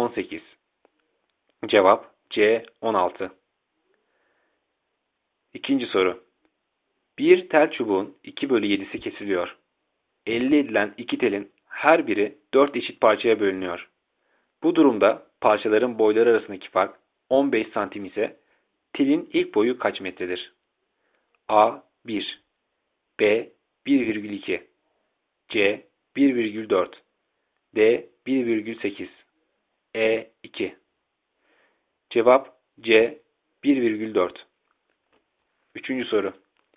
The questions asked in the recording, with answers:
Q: Bu durumda parçaların boyları arasındaki fark 15 santim ise telin ilk boyu kaç metredir?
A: Cevap C. 1,4